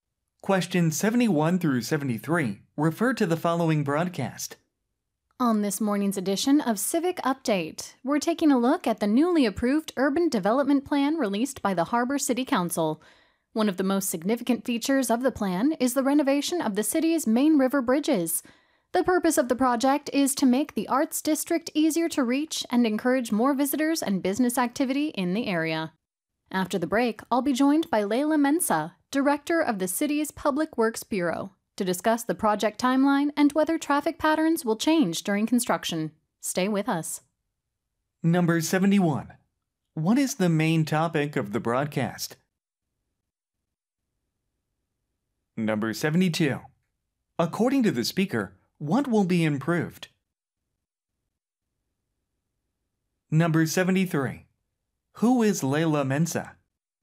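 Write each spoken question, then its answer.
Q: What is the main topic of the broadcast?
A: A newly approved urban development plan

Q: According to the speaker, what will be improved?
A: The city's main river bridges

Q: Who is Layla Mensa?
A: Director of the City's Public Works Bureau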